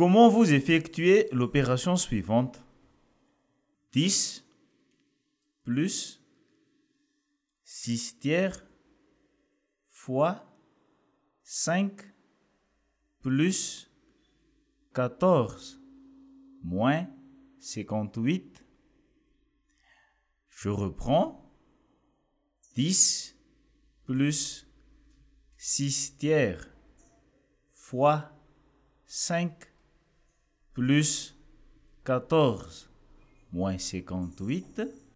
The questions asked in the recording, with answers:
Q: Comment vous effectuez l'opération suivante? 10 plus 6 tiers fois 5 plus 14 moins 58.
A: 10 plus 10 plus 14 moins 58 est égal moins 24.